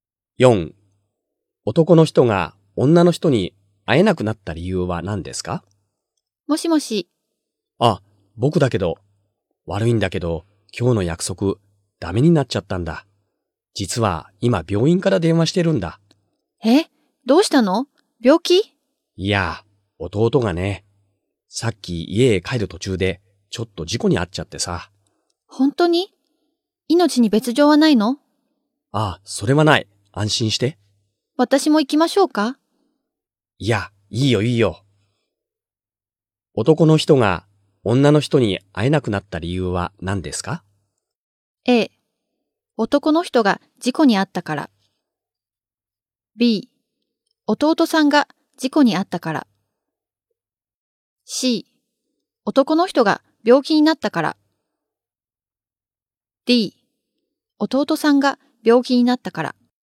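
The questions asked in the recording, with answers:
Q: 男の人が女の人に会えなくなった理由は何ですか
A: B: 弟さんが事故に遭ったから。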